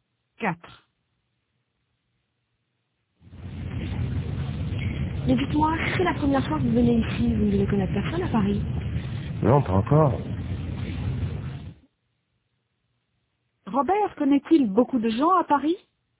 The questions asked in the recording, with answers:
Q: Robert connaît-il beaucoup de gens à Paris?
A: Non, pas encore.